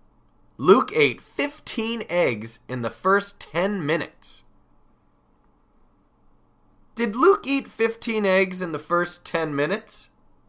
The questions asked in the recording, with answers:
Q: Did Luke eat 15 eggs in the first 10 minutes?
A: Yes, he did. He ate 15 eggs in the first 10 minutes.